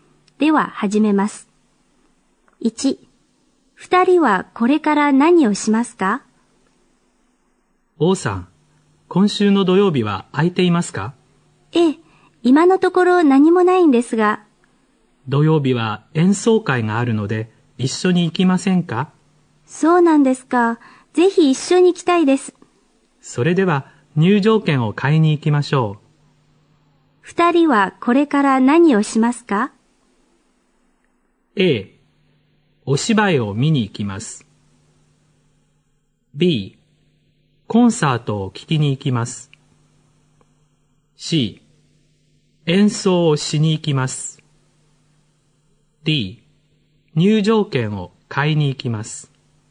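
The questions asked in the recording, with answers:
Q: 二人はこれから何をしますか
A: D: 入場券を買いに行きます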